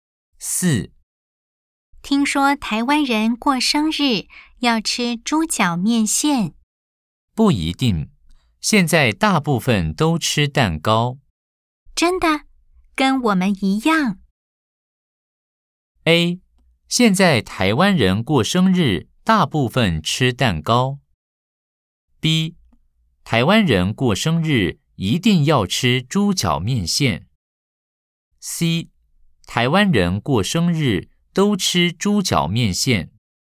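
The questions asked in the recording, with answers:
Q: A, 现在台湾人过生日大部分吃蛋糕。B。台湾人过生日一定要吃猪脚面线。 C, 台湾人过生日都吃猪脚面线。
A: A: 现在台湾人过生日大部分吃蛋糕。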